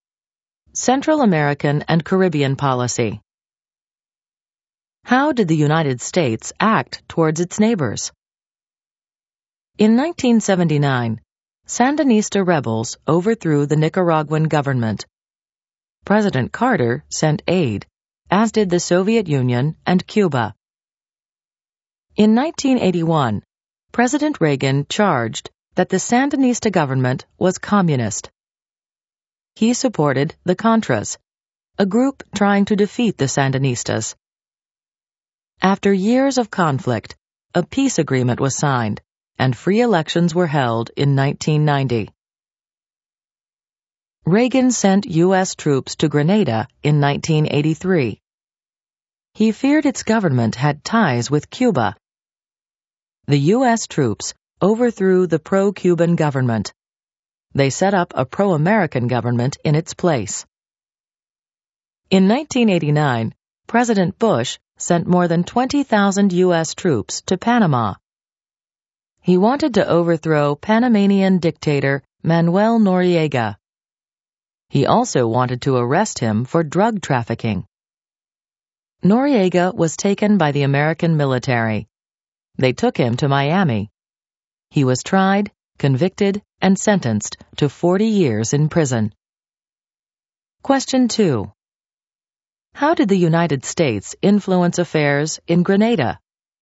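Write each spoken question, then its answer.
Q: How did the United States influence affairs in Grenada?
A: U.S. troops overthrew the pro-Cuban government and set up a pro-American one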